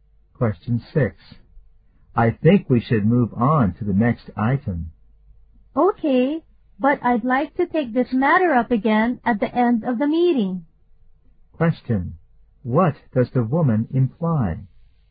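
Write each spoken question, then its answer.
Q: What does the woman imply?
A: She wants to discuss the matter again at the end of the meeting.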